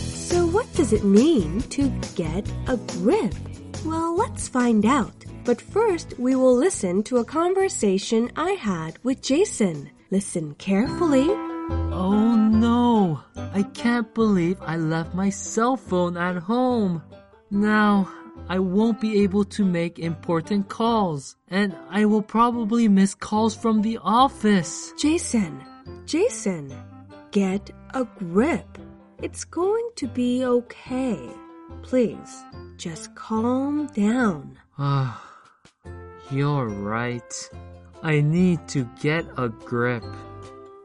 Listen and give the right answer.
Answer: To get a grip means to make an effort to control your emotions.